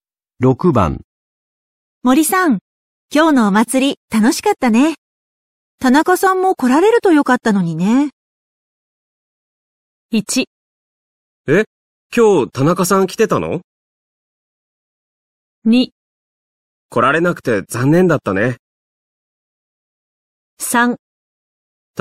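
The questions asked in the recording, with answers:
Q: 森さん、今日のお祭り楽しかったね。田中さんも来られるとよかったのにね。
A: 2: 来られなくて残念だったね。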